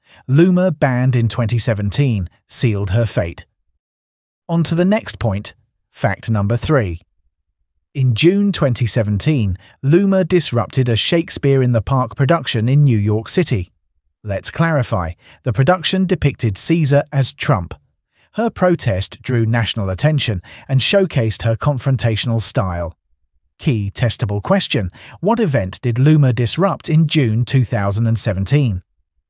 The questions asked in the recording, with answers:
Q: What event did Loomer disrupt in June 2017?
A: Correct answer. Shakespeare in the Park.